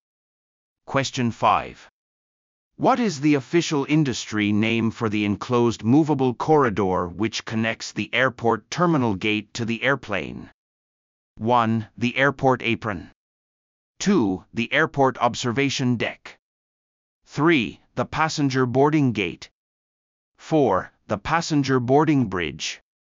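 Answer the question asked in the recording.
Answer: 4: The passenger boarding bridge.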